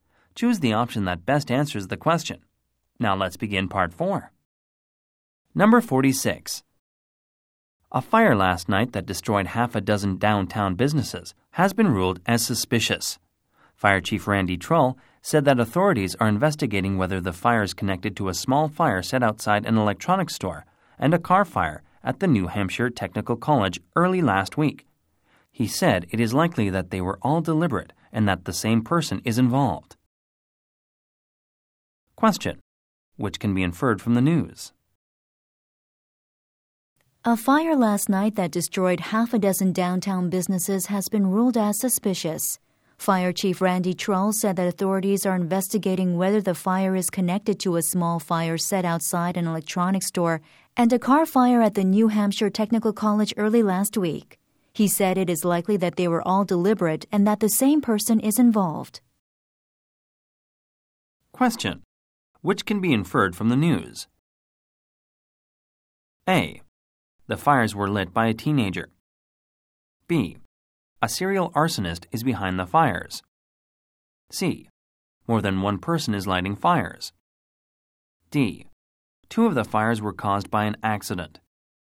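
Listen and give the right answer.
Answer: B: A serial arsonist is behind the fires.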